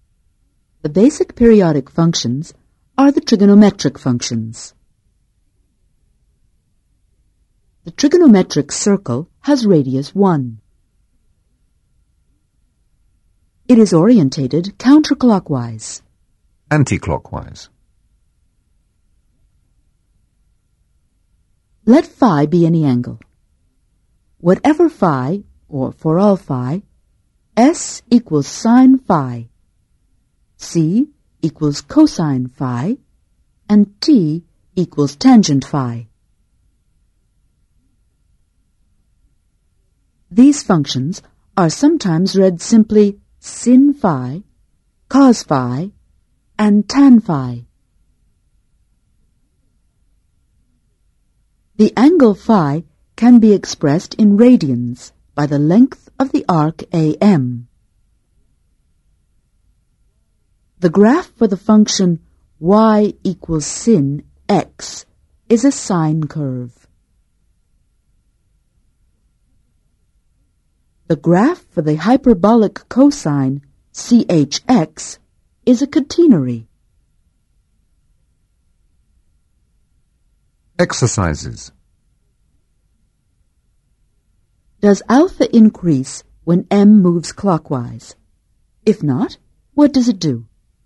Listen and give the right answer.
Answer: No, it decreases.